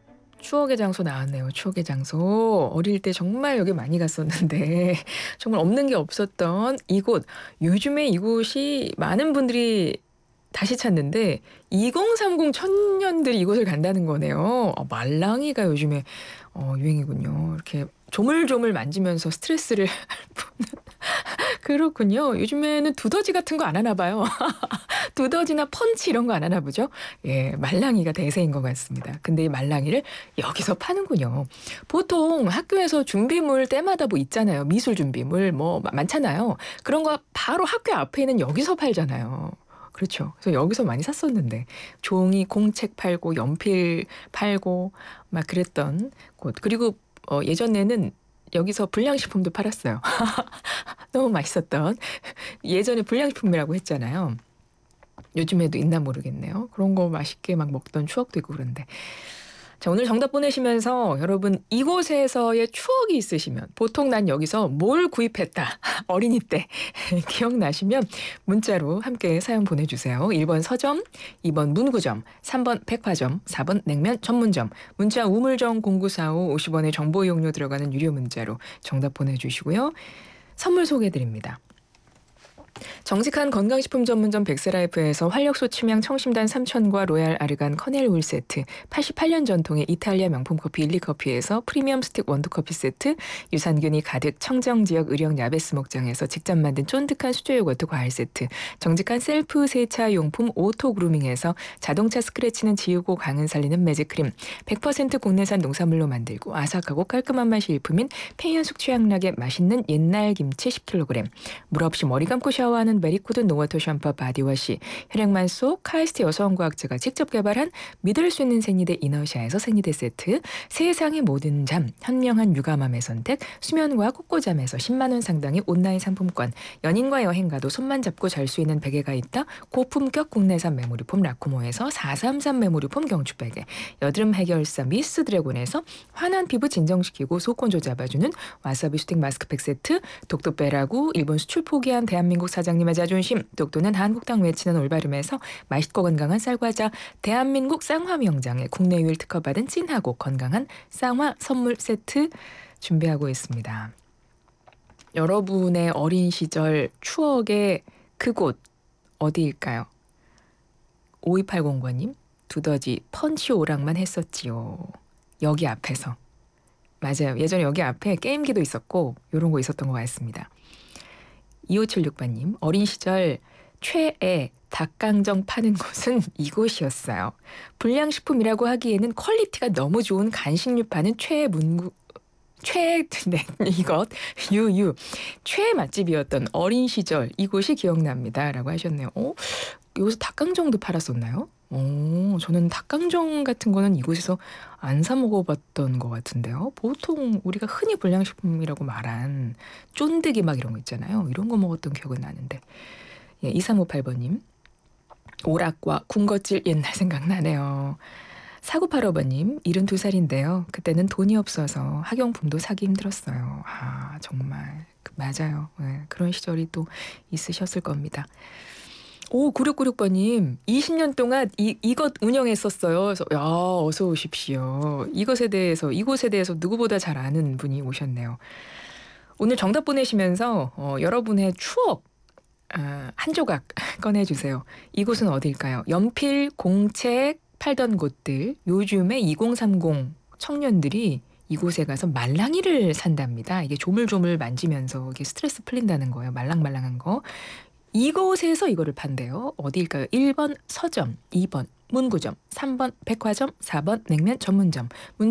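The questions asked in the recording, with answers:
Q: 말랑말랑한 거. 이곳에서 이거를 판대요. 어디일까요?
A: 2: 문구점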